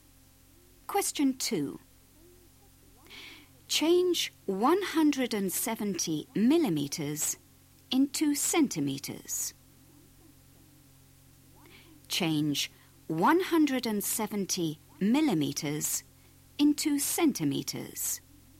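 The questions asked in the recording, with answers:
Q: Change 170 millimeters into centimeters.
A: 17 cm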